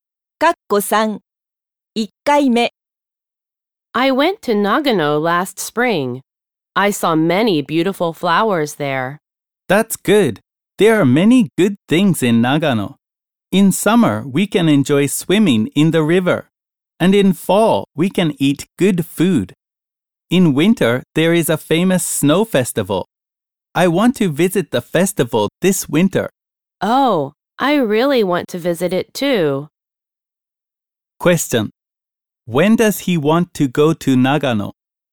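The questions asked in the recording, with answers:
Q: When does he want to go to Nagano?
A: This winter.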